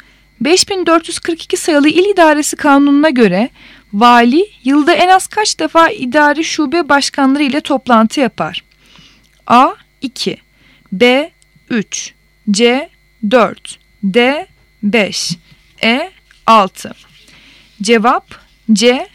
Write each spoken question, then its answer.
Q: 5442 sayılı İl İdaresi Kanunu'na göre vali yılda en az kaç defa idari şube başkanları ile toplantı yapar?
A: Cevap C.